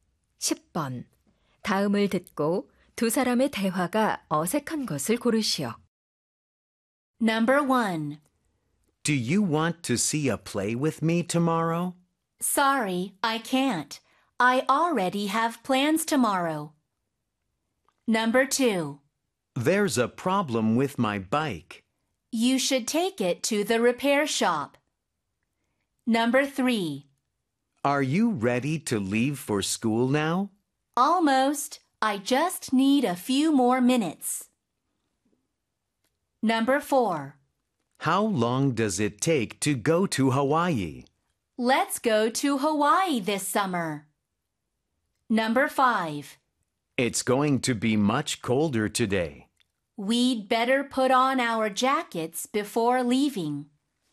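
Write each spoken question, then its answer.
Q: 다음을 듣고 두 사람의 대화가 어색한 것을 고르시오.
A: 4: How long does it take to go to Hawaii? / Let's go to Hawaii this summer.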